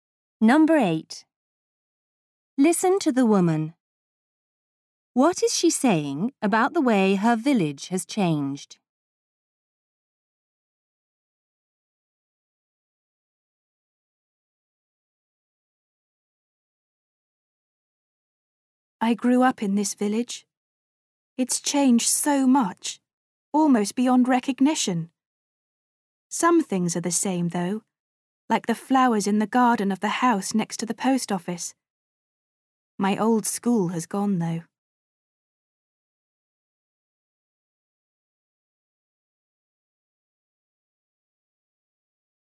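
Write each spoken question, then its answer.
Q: What is she saying about the way her village has changed?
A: It has changed almost beyond recognition, though some things are the same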